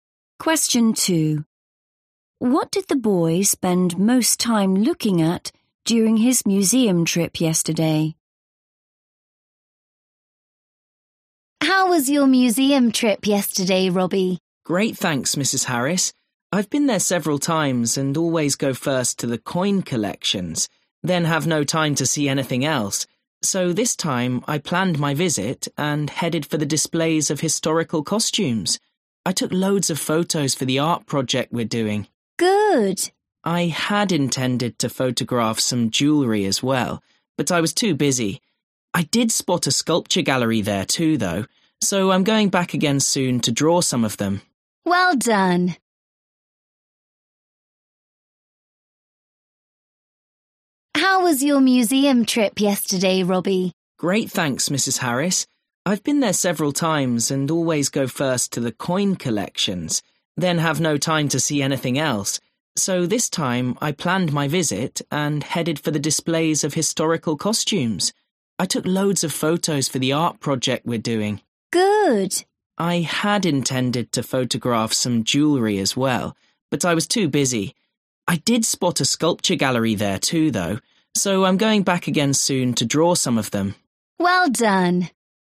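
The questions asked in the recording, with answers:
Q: What did the boy spend most time looking at during his museum trip yesterday?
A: historical costumes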